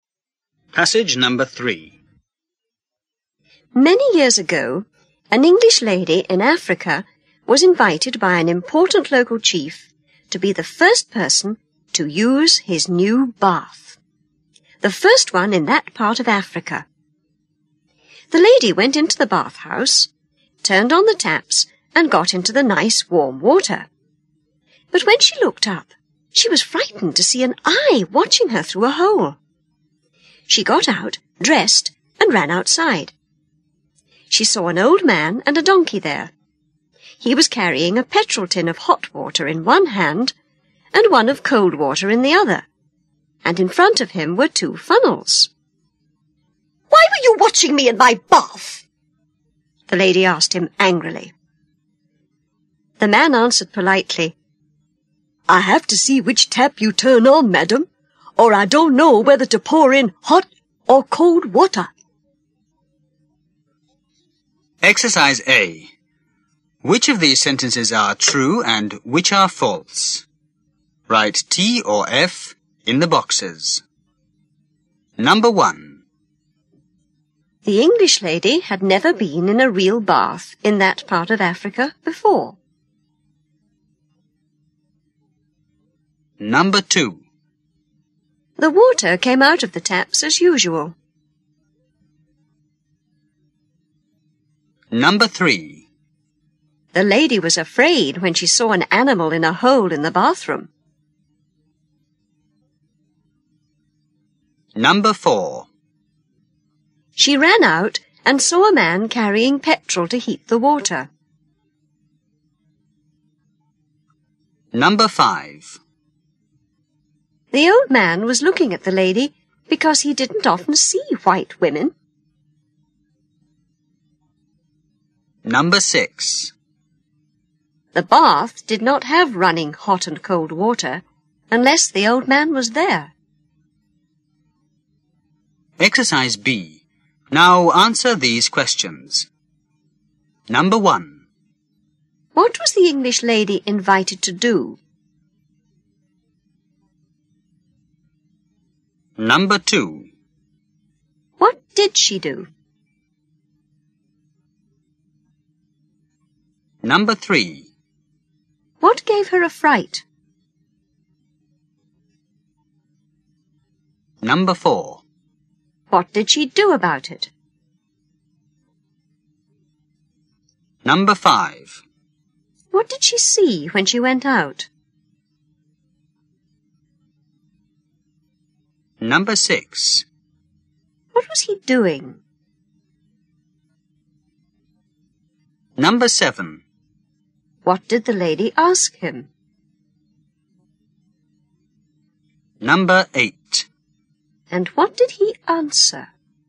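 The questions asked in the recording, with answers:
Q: The English lady had never been in a real bath in that part of Africa before.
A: True

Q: The water came out of the taps as usual.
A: False

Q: The lady was afraid when she saw an animal in a hole in the bathroom.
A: False

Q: She ran out and saw a man carrying petrol to heat the water.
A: False

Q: The old man was looking at the lady because he didn't often see white women.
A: False

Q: The bath did not have running hot and cold water unless the old man was there.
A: True

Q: What was the English lady invited to do?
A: To be the first person to use the chief's new bath

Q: What did she do?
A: She went into the bathhouse, turned on the taps and got into the warm water

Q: What gave her a fright?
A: An eye watching her through a hole

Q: What did she do about it?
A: She got out, dressed and ran outside

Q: What did she see when she went out?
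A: An old man and a donkey

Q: What was he doing?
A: Carrying petrol tins of hot and cold water, with two funnels in front of him

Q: What did the lady ask him?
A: Why he was watching her in her bath

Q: And what did he answer?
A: He had to see which tap she turned on to know whether to pour in hot or cold water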